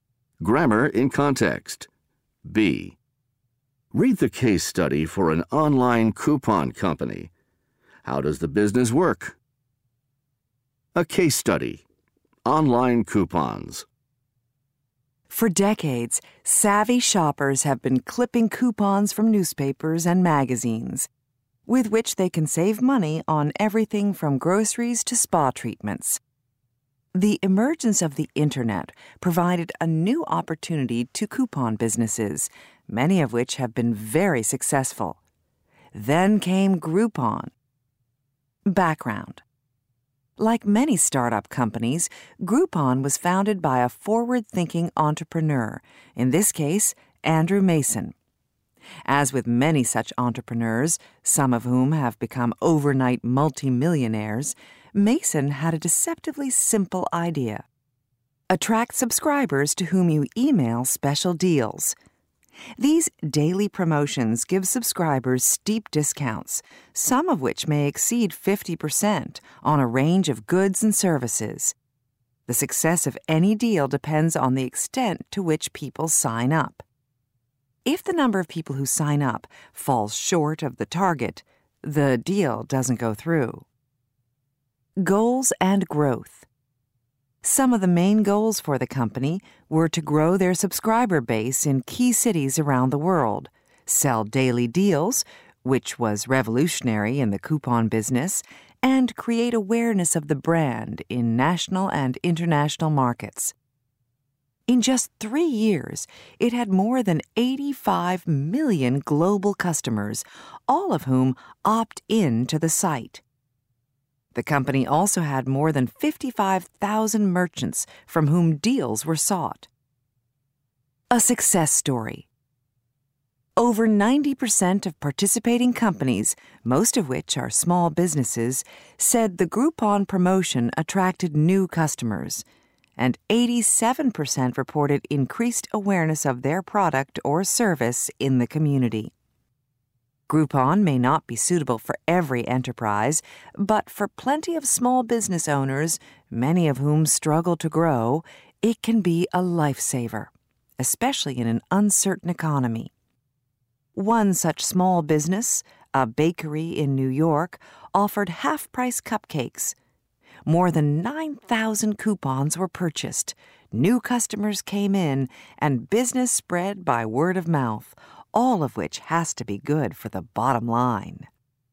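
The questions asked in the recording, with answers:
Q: How does the business work?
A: It emails subscribers daily deals with steep discounts; a deal goes through only if enough people sign up.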